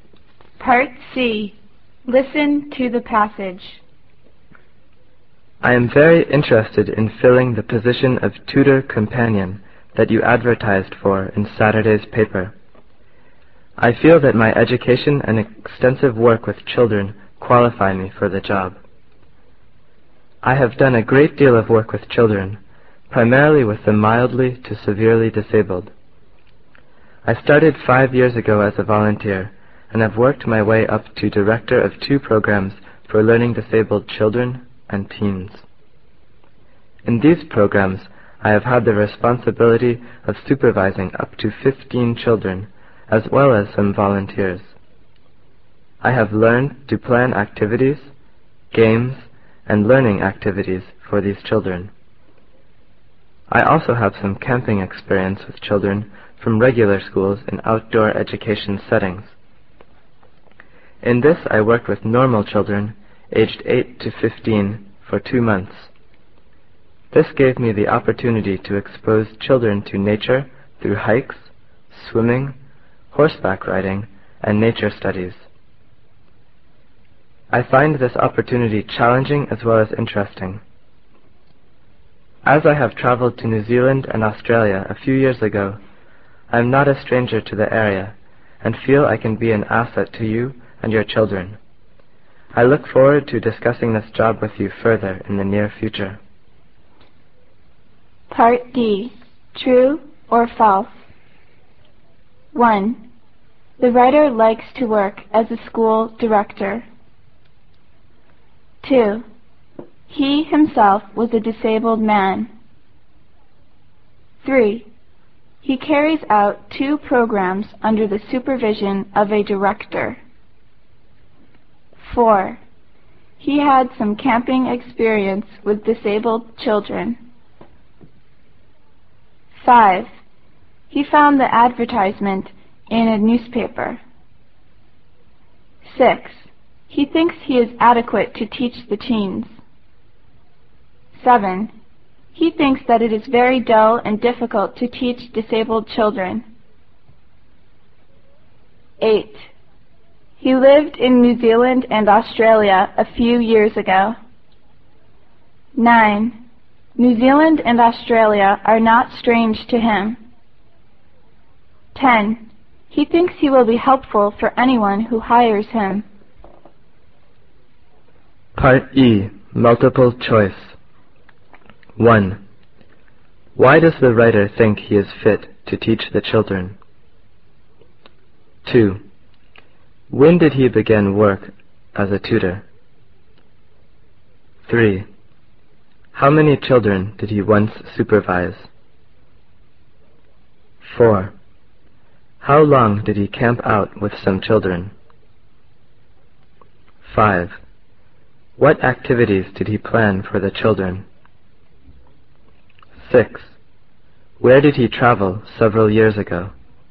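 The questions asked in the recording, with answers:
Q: The writer likes to work as a school director.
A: False

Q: He carries out 2 programs under the supervision of a director.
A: False

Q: He had some camping experience with disabled children.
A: False

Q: He found the advertisement in a newspaper.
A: True

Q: He thinks that it is very dull and difficult to teach disabled children.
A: False

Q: He lived in New Zealand and Australia a few years ago.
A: False

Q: New Zealand and Australia are not strange to him.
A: True

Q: Why does the writer think he is fit to teach the children?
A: His education and extensive work with children

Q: How many children did he once supervise?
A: Up to 15

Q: How long did he camp out with some children?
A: 2 months

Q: What activities did he plan for the children?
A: Activities, games and learning activities

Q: Where did he travel several years ago?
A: New Zealand and Australia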